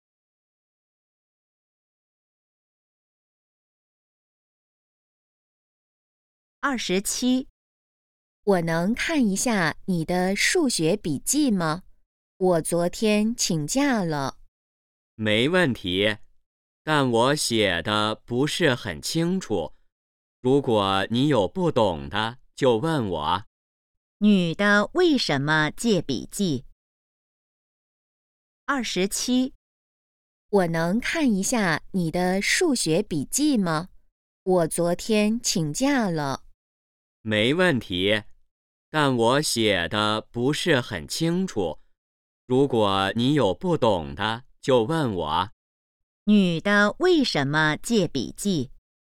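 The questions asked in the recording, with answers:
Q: 女的为什么借笔记?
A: 她昨天请假了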